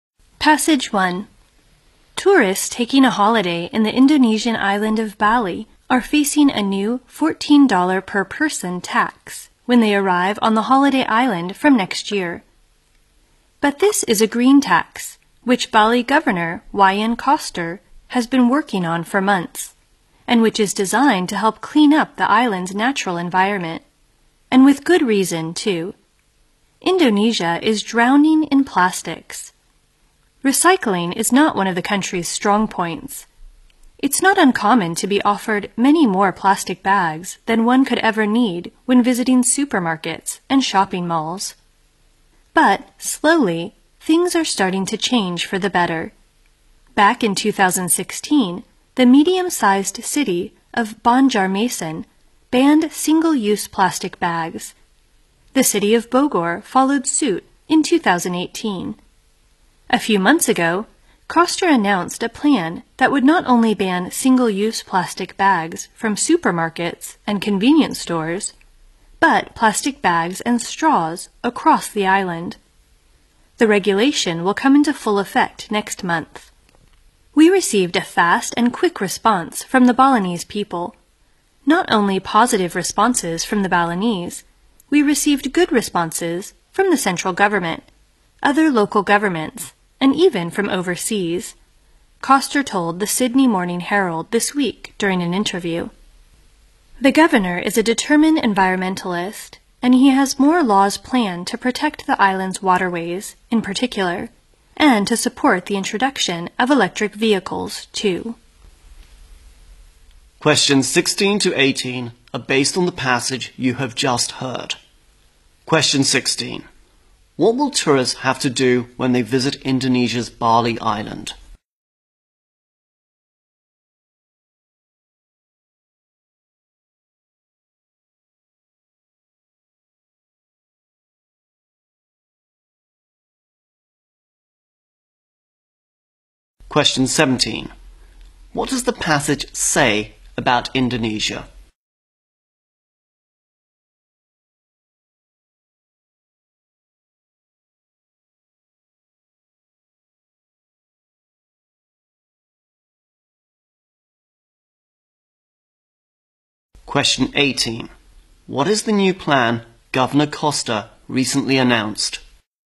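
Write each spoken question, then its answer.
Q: What will tourists have to do when they visit Indonesia's Bali Island?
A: Pay a $14 green tax

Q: What does the passage say about Indonesia?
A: It is drowning in plastics

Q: What is the new plan Governor Koster recently announced?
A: To ban single-use plastic bags and straws across the island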